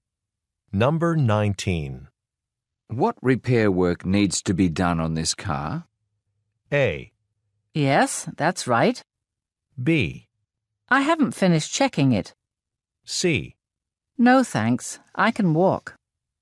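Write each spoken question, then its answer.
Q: What repair work needs to be done on this car?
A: B: I haven't finished checking it.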